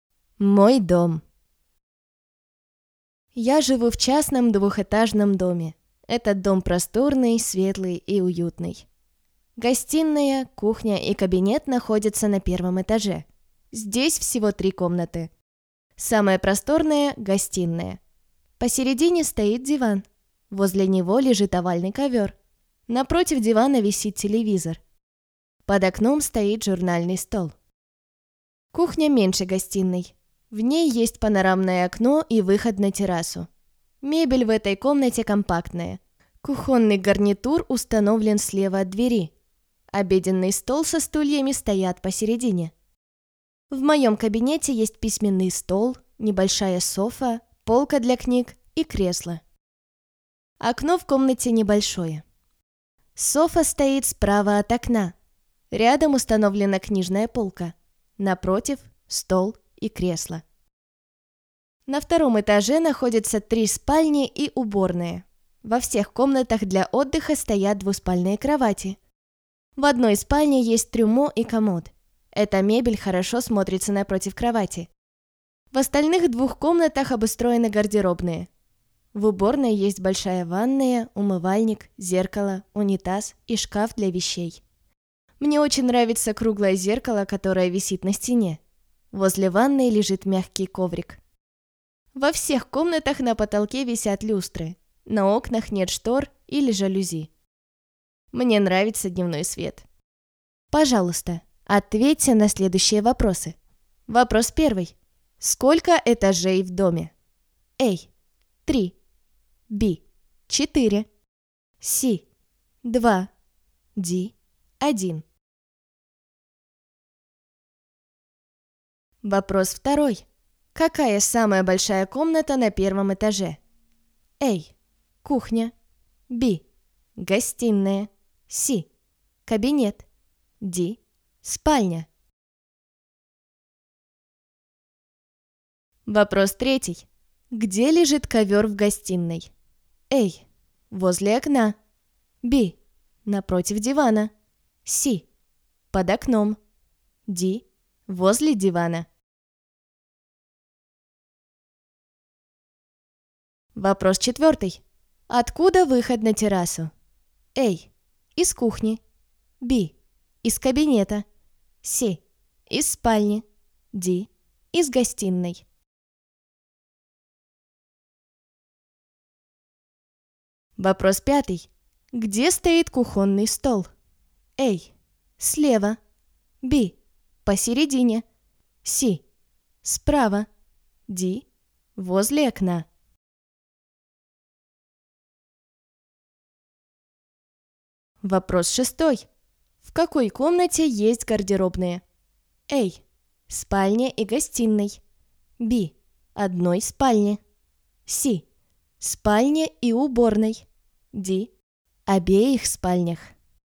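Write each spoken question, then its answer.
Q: Сколько этажей в доме?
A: C: 2

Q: Какая самая большая комната на первом этаже?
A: B: Гостиная

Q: Где лежит ковер в гостиной?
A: D: Возле дивана

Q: Откуда выход на террасу?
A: A: Из кухни

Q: Где стоит кухонный стол?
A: B: Посередине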